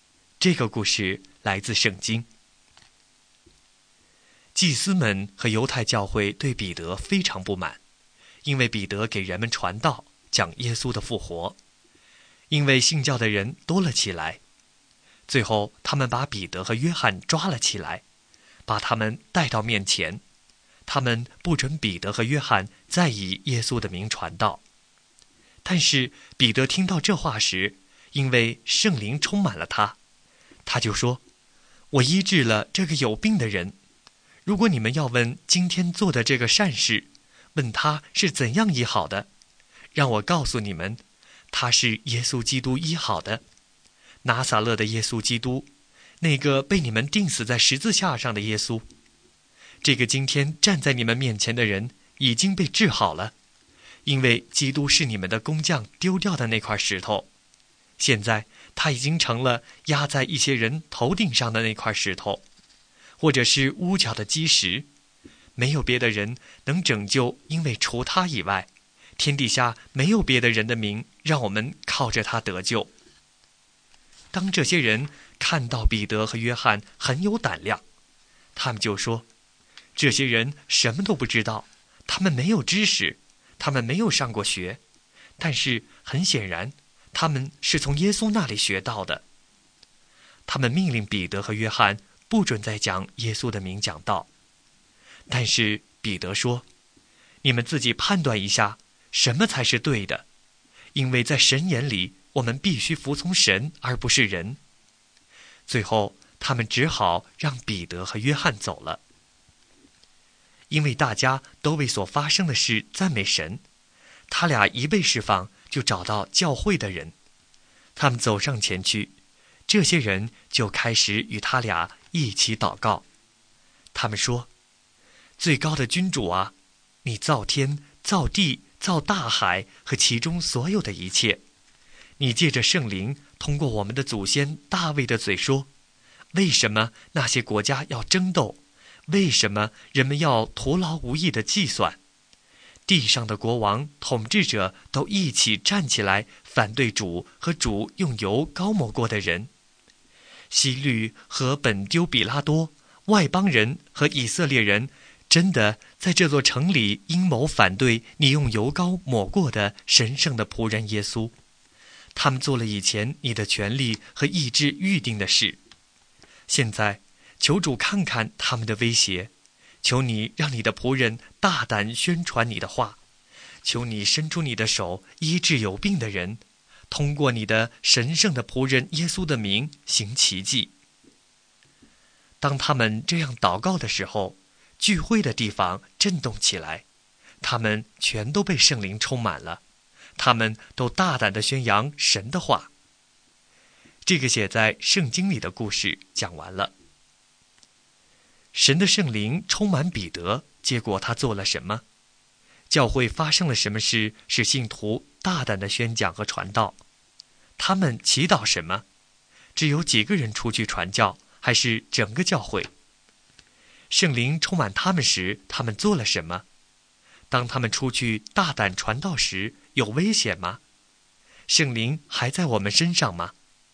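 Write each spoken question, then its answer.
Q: 神的圣灵充满彼得,结果他做了什么?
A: 他大胆地说话,说那个病人是靠拿撒勒人耶稣基督的名治好的

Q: 他们祈祷什么?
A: 求主让仆人大胆传讲神的话,伸手医治病人,借耶稣的名行奇迹

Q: 只有几个人出去传教,还是整个教会?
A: 整个教会,他们都被圣灵充满

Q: 圣灵充满他们时,他们做了什么?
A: 他们都大胆地宣扬神的话

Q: 当他们出去大胆传道时,有危险吗?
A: 有,官长们威胁他们,不准他们再奉耶稣的名传道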